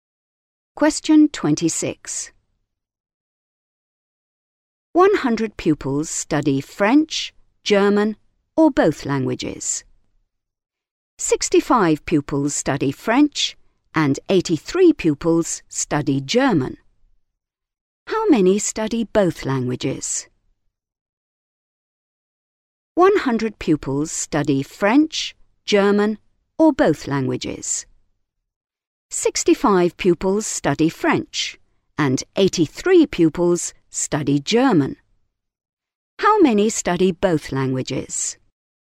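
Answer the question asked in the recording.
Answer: 48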